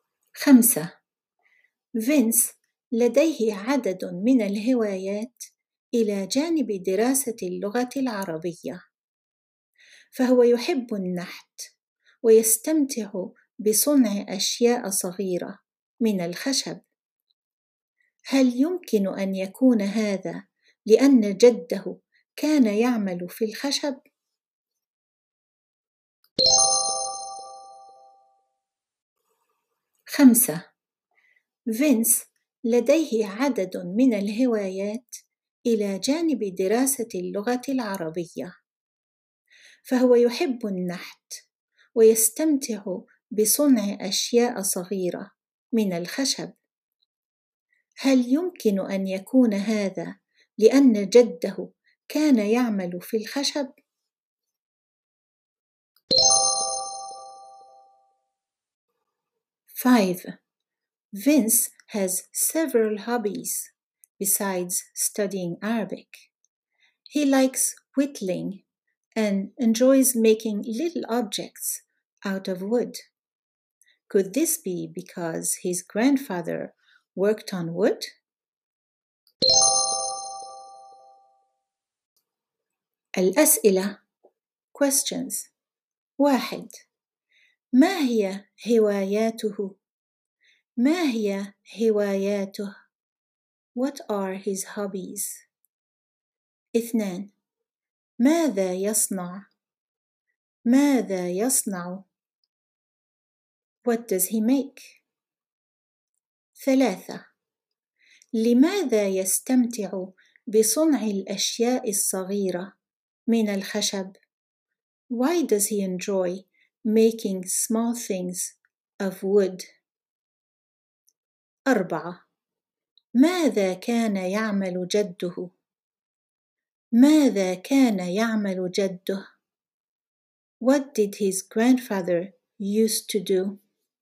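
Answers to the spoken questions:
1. النحت ودراسة اللغة العربية
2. أشياء صغيرة من الخشب
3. ربما لأن جده كان يعمل في الخشب
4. كان يعمل في الخشب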